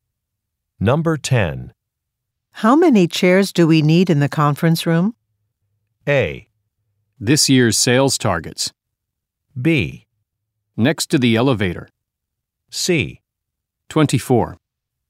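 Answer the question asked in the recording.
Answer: C: 24.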